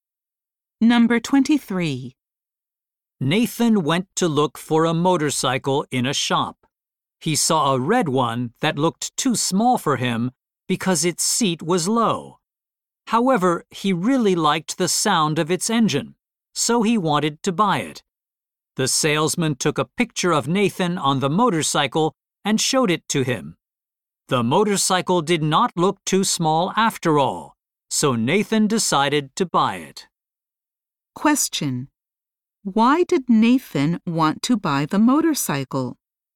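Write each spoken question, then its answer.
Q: Why did Nathan want to buy the motorcycle?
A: He liked the sound of its engine.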